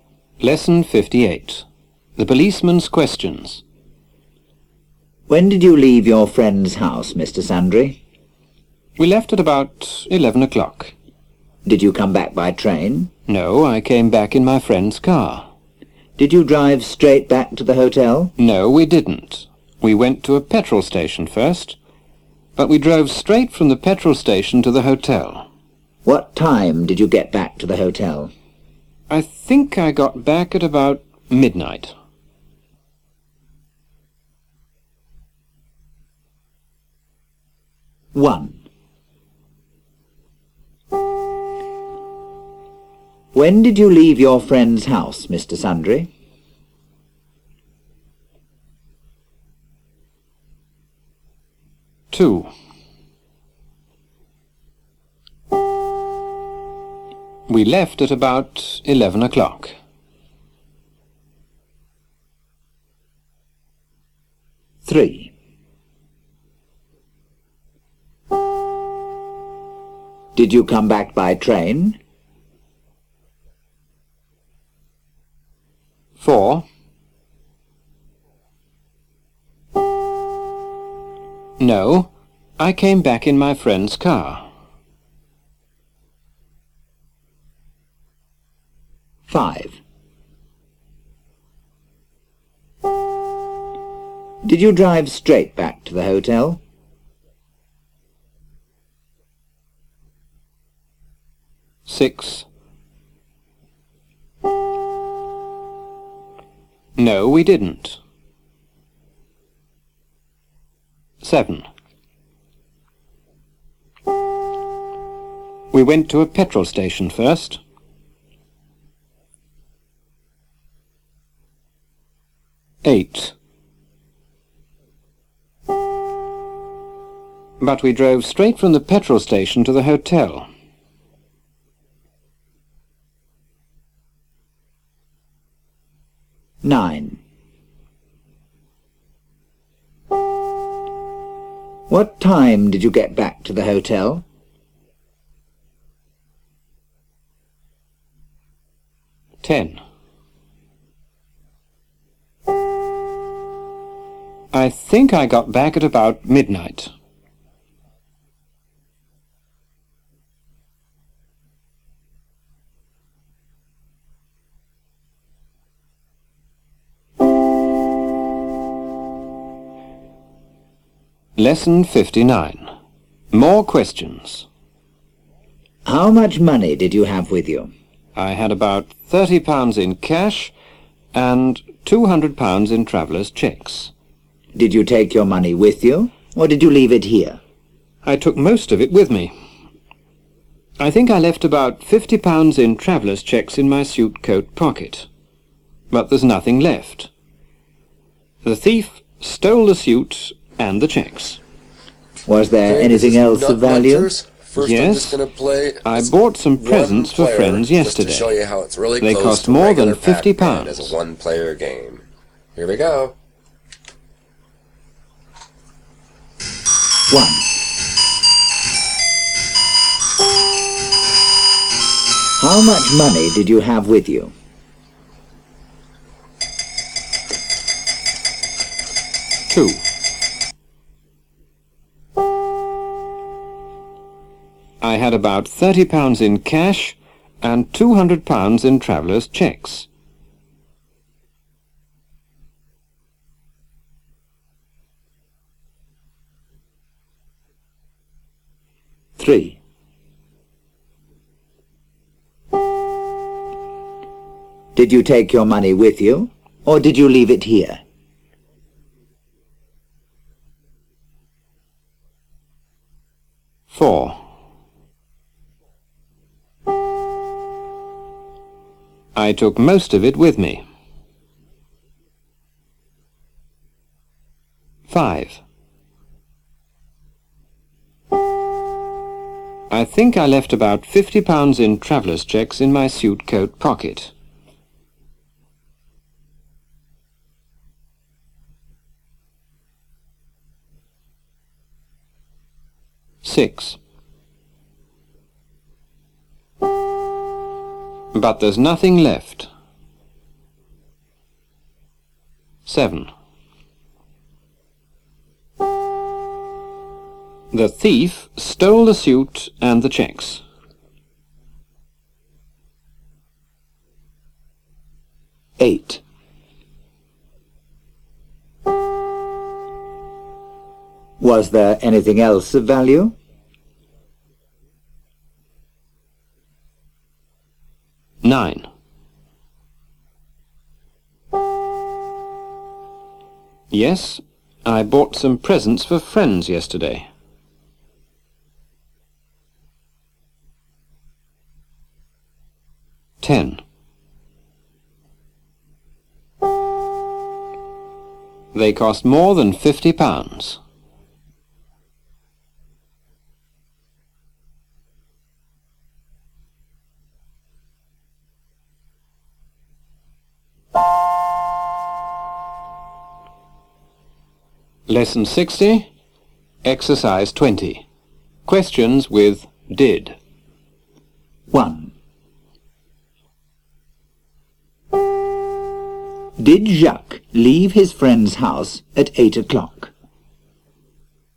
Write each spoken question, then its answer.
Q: Did Jacques leave his friend's house at 8 o'clock?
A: No, he didn't. He left at 11 o'clock.